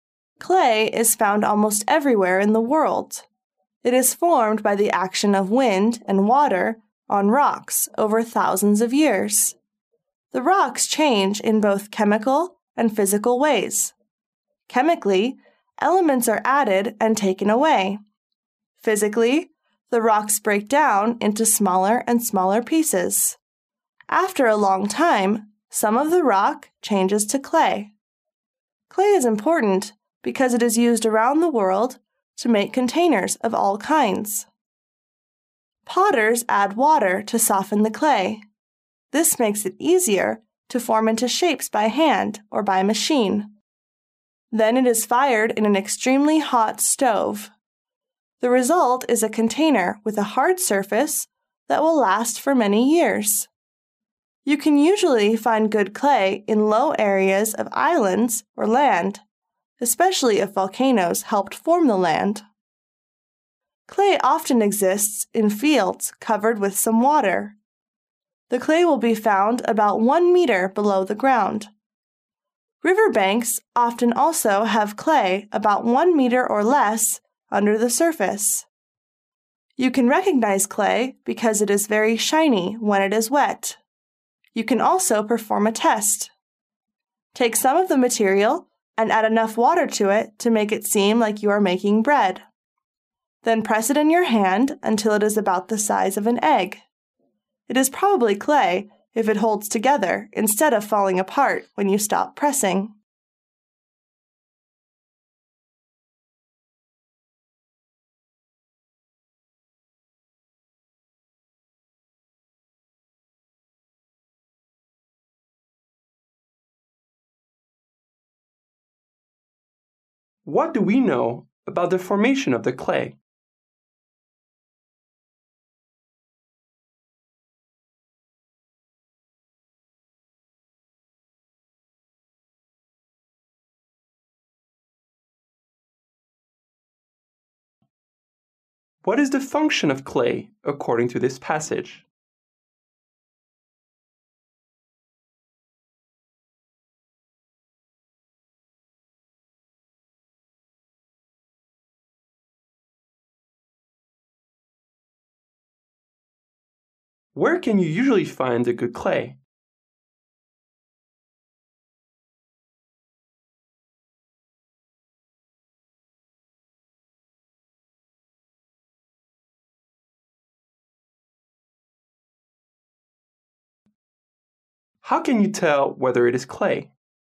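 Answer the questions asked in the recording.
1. It is formed by wind and water acting on rocks over thousands of years.
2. It is used to make containers of all kinds.
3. In low areas of islands or land, especially volcanic land.
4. It is very shiny when wet, and a wet ball of it holds together when pressed.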